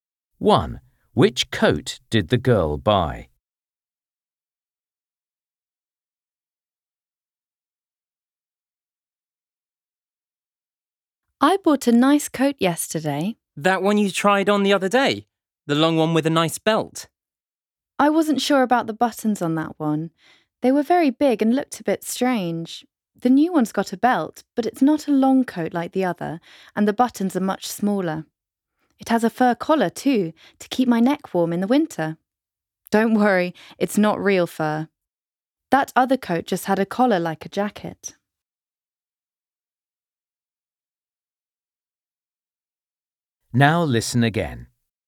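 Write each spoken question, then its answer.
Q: Which coat did the girl buy?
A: A short coat with a belt, small buttons and a fur collar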